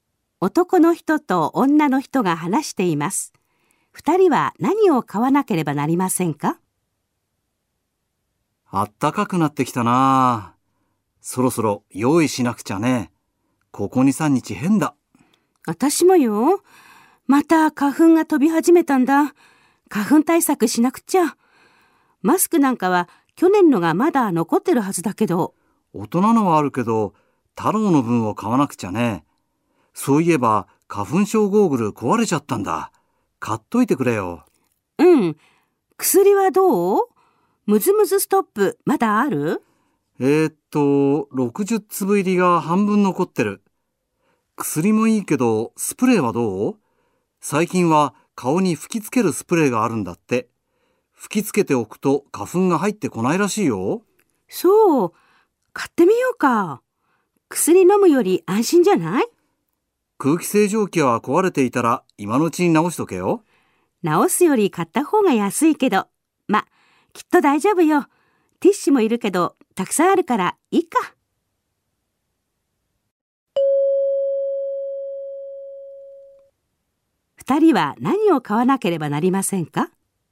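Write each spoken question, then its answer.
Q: 二人は何を買わなければなりませんか?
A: 太郎の(子ども用の)マスク、花粉症ゴーグル、顔に吹きつけるスプレー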